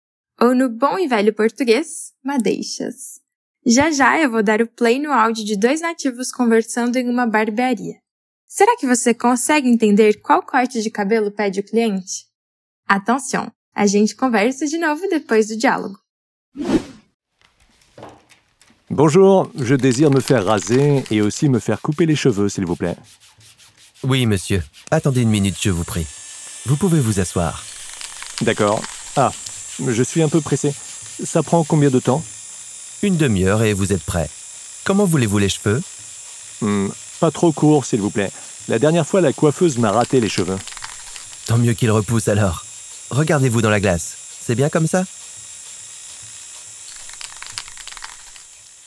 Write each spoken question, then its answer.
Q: Será que você consegue entender qual corte de cabelo pede o cliente?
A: não muito curto, por favor.